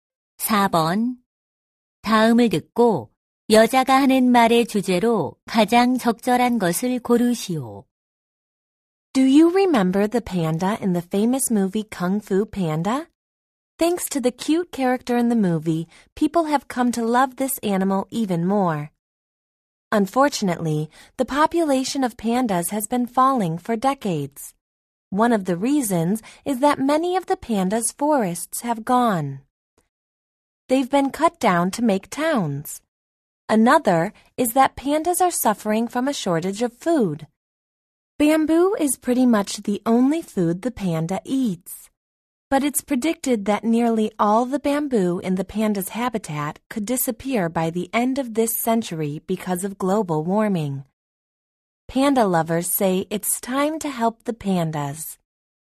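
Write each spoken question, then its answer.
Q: 다음을 듣고 여자가 하는 말의 주제로 가장 적절한 것을 고르시오.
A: 판다 개체 수가 감소하는 원인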